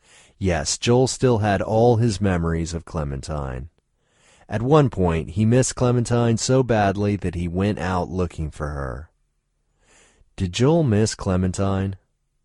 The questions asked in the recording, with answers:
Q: Did Joel miss Clementine?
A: Yes, Joel missed Clementine badly.